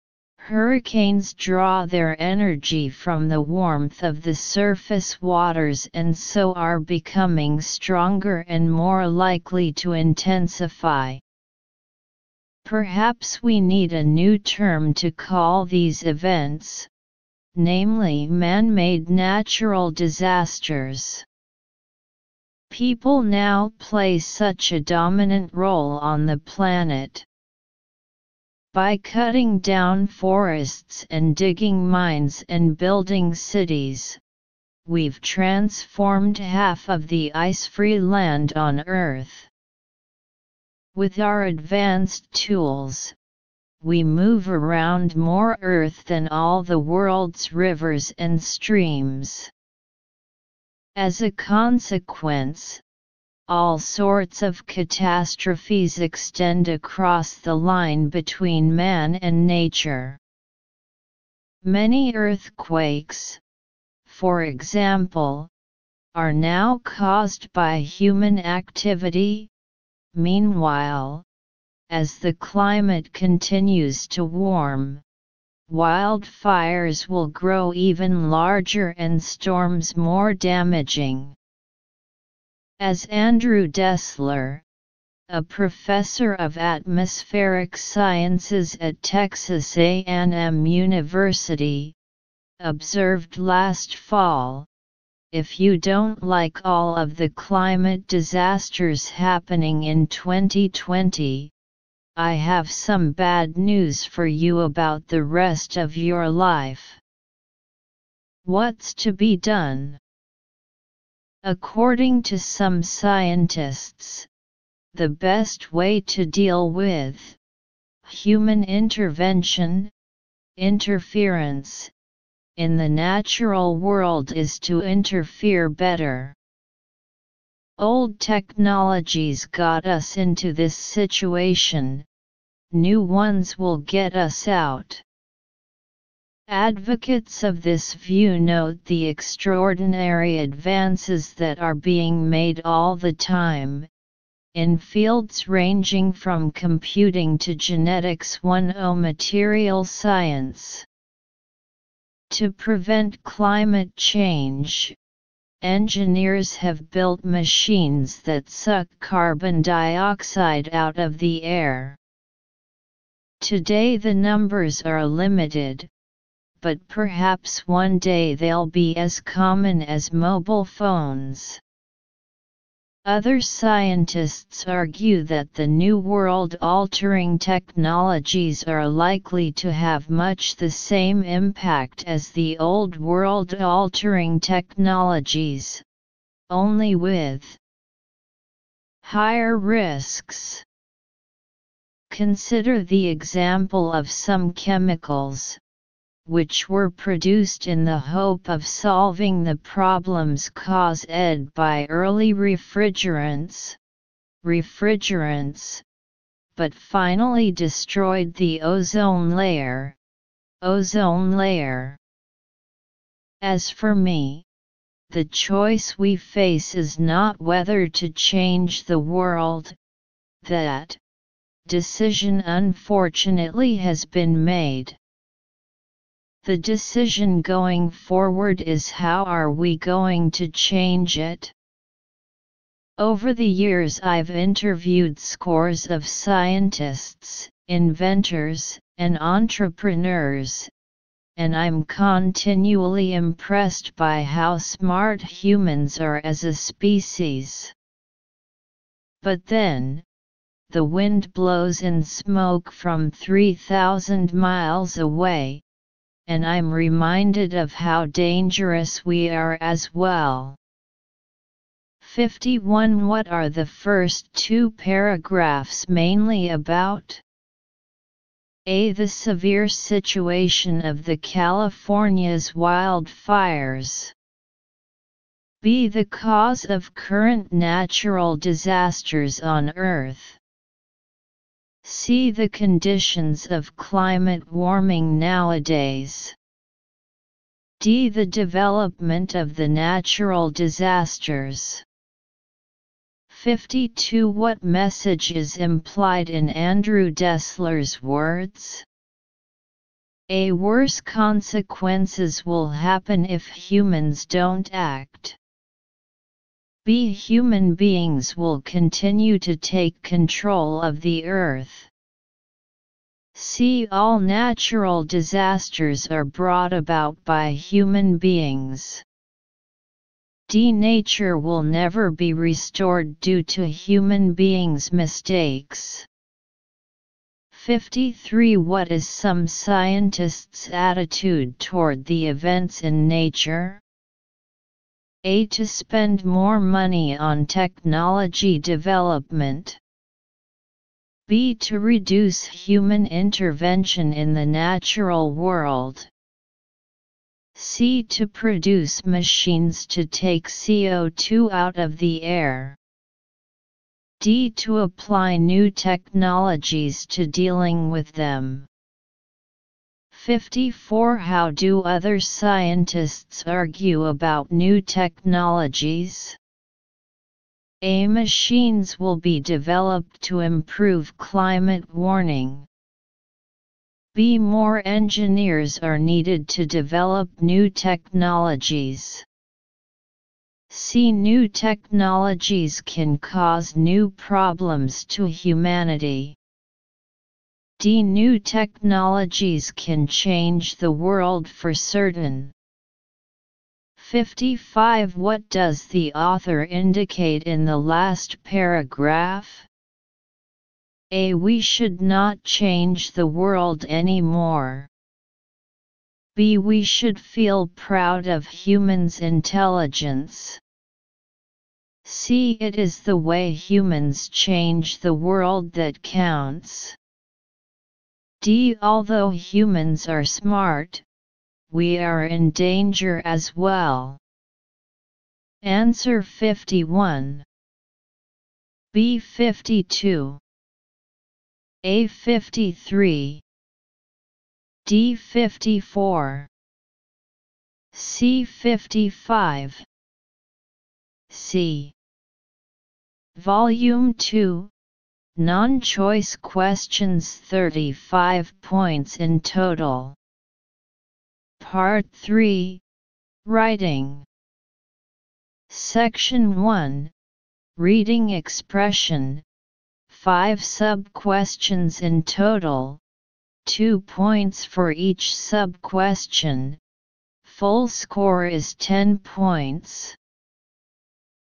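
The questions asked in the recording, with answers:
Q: What are the first two paragraphs mainly about?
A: B: The cause of current natural disasters on Earth.

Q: What message is implied in Andrew Dessler's words?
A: A: Worse consequences will happen if humans don't act.

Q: What is some scientists' attitude toward the events in nature?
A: D: To apply new technologies to dealing with them.

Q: How do other scientists argue about new technologies?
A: C: New technologies can cause new problems to humanity.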